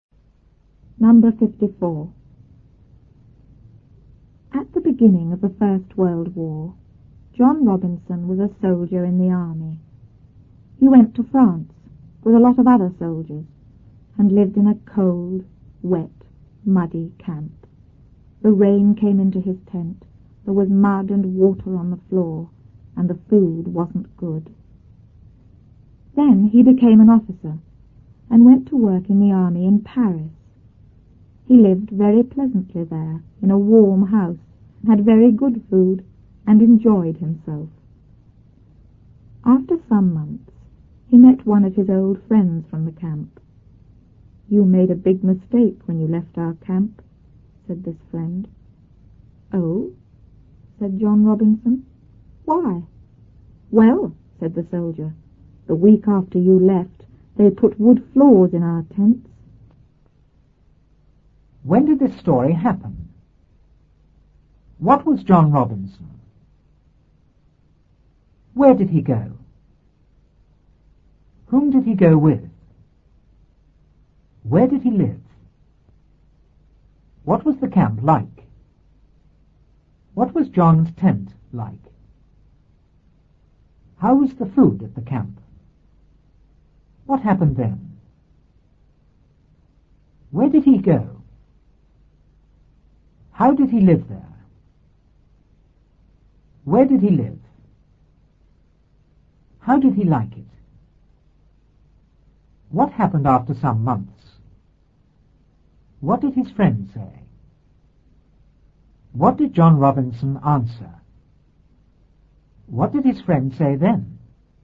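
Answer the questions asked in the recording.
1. At the beginning of the First World War
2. A soldier in the army
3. To France
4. A lot of other soldiers
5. In a cold, wet, muddy camp
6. Cold, wet and muddy
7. The rain came in; there was mud and water on the floor
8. It wasn't good
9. He became an officer
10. To work in the army in Paris
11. Very pleasantly
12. In a warm house
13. He enjoyed himself
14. He met one of his old friends from the camp
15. You made a big mistake when you left our camp
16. Oh? Why?
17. The week after you left, they put wood floors in our tents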